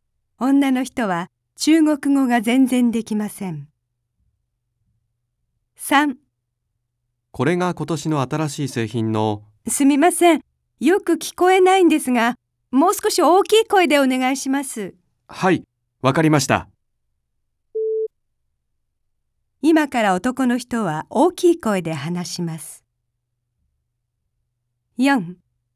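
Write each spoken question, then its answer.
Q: 今から男の人は大きい声で話します。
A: ○(正しい)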